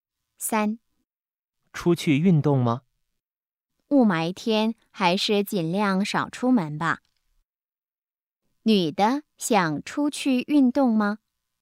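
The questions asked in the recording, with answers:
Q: 女的想出去运动吗?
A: 不想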